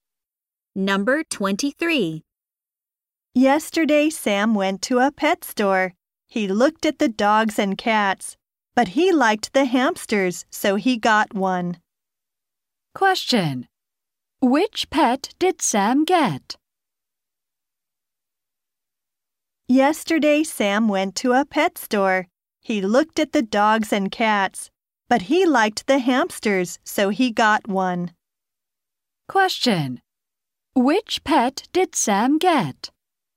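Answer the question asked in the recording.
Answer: A hamster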